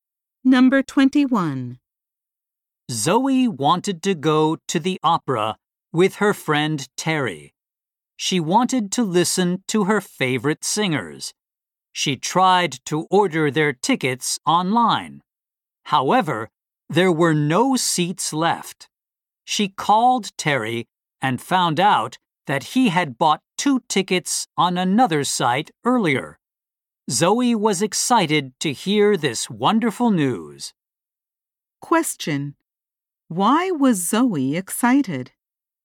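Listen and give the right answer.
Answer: Terry had already bought two tickets for the opera.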